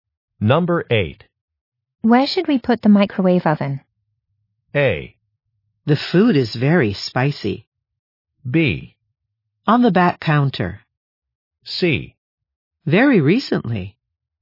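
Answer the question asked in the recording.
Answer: B: On the back counter.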